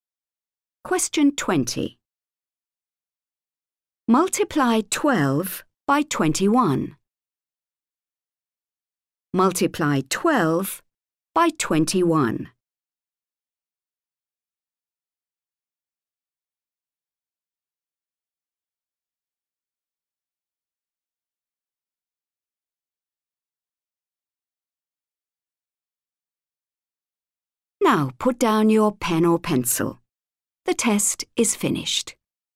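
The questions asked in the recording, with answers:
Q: Multiply 12 by 21.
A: 252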